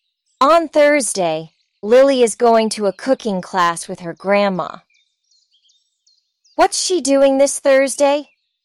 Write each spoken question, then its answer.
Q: What's she doing this Thursday?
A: She's going to a cooking class.